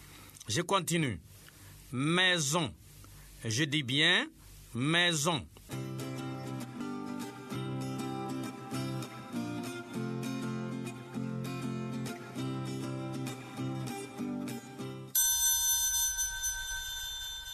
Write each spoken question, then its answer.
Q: Maison. Je dis bien maison.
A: Monsieur, il y a deux syllabes, mais et zon.